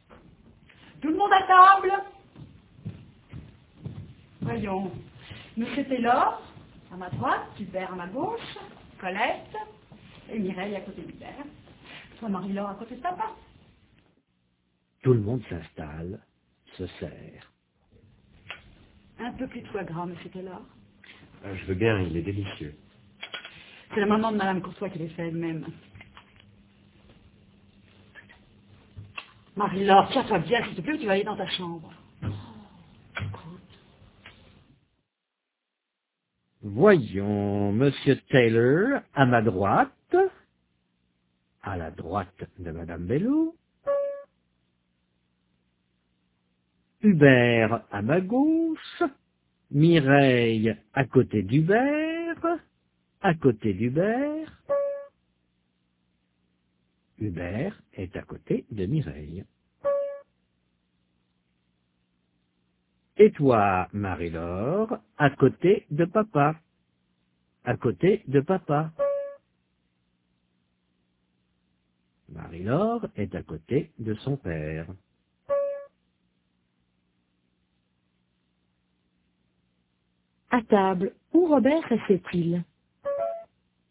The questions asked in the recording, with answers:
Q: À table, où Robert restait-il?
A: À la droite de madame Bello.